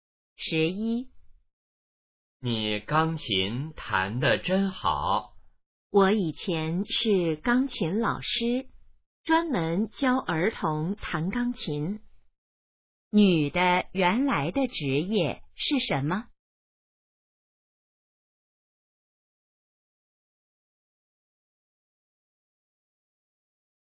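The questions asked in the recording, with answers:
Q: 女的原来的职业是什么?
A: 钢琴老师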